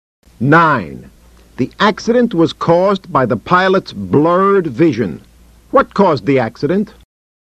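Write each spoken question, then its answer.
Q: What caused the accident?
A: The pilot's blurred vision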